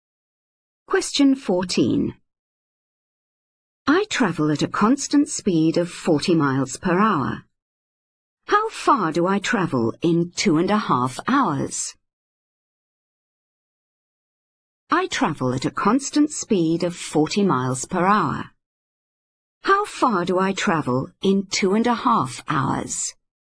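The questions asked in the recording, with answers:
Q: How far do I travel in 2.5 hours?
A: 100 miles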